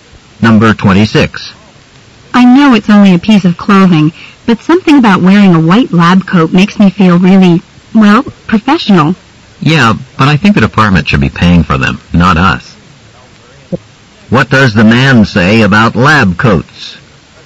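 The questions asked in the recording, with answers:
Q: What does the man say about lab coats?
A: The department should pay for them.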